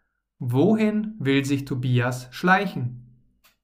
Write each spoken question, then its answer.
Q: Wohin will sich Tobias schleichen?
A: Aus der Firma. Er will sich aus der Firma schleichen.